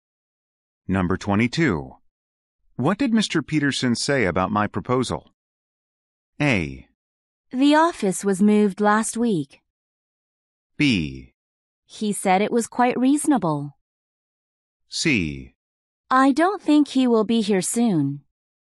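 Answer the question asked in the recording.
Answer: B: He said it was quite reasonable.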